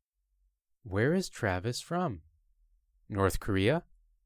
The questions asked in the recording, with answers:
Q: Where is Travis from? North Korea?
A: No, Travis isn't from North Korea.